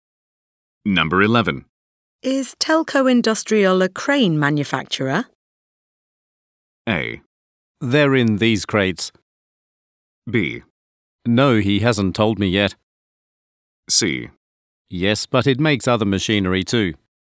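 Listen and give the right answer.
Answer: C: Yes, but it makes other machinery too.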